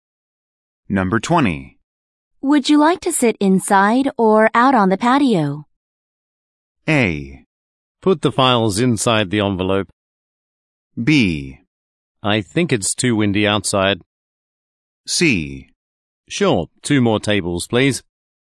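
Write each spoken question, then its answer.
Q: Would you like to sit inside or out on the patio?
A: B: I think it's too windy outside.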